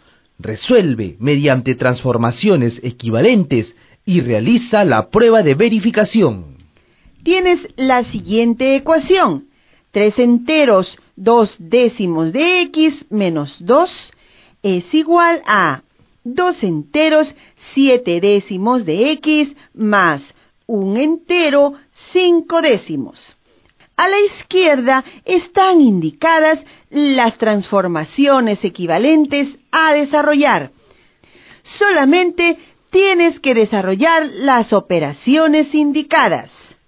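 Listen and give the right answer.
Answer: x = 7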